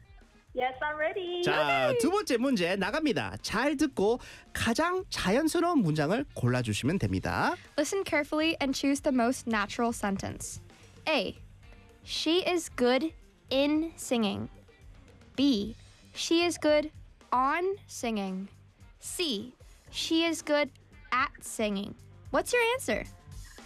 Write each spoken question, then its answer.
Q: Listen carefully and choose the most natural sentence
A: 정답은 3번 good at로 하겠습니다.